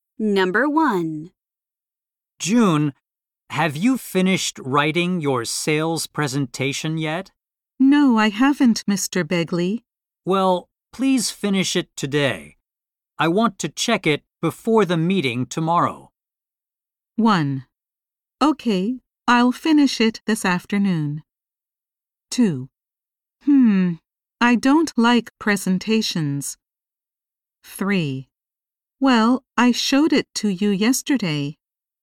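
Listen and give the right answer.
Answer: 1: Okay, I'll finish it this afternoon.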